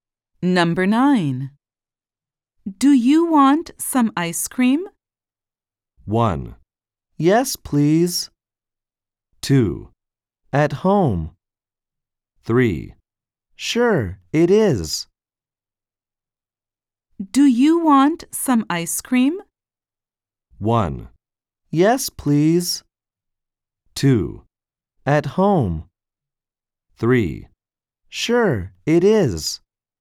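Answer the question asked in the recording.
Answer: 1: Yes, please.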